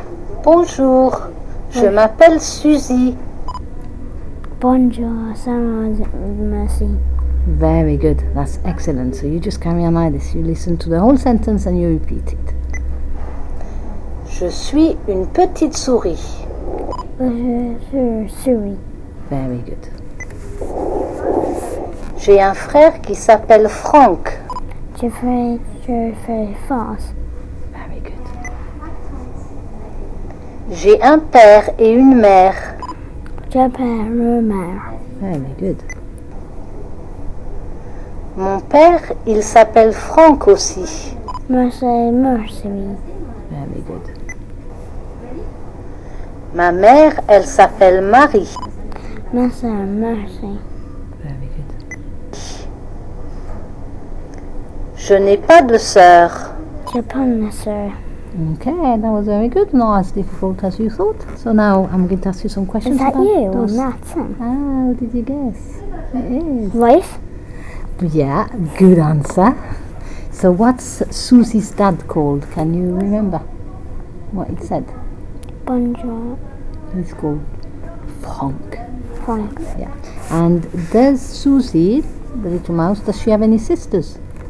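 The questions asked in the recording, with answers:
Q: And does Susie, the little mouse, does she have any sisters?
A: No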